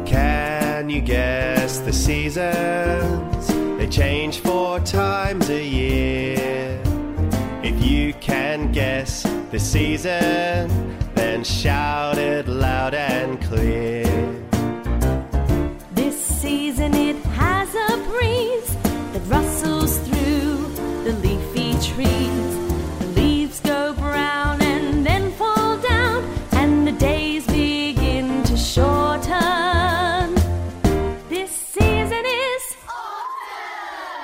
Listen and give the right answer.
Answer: autumn.